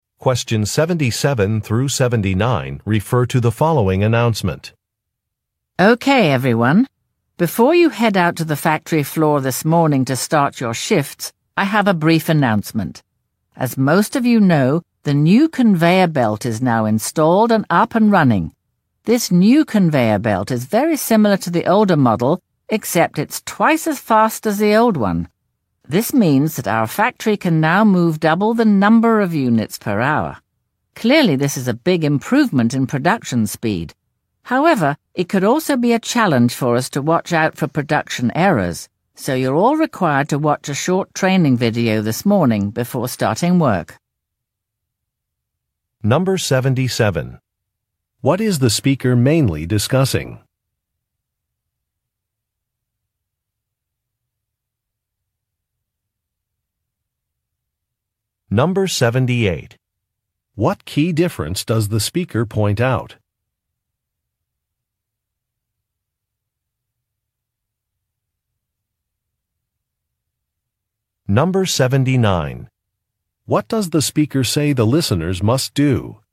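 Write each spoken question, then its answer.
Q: What is the speaker mainly discussing?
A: A new conveyor belt

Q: What key difference does the speaker point out?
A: It is twice as fast as the old one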